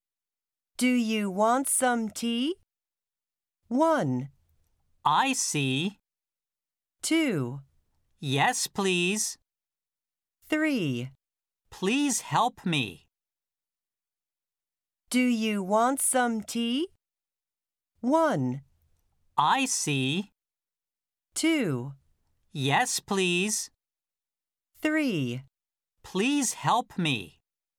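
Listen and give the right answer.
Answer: 2: Yes, please.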